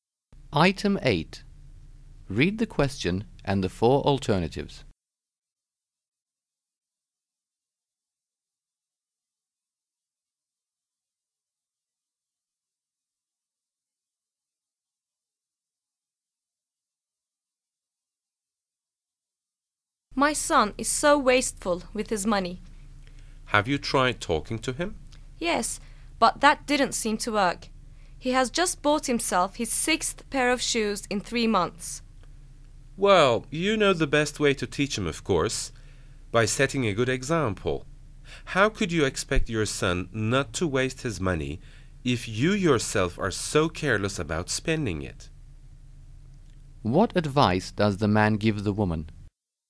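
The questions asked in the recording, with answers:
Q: What advice does the man give the woman?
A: Set a good example by not wasting her own money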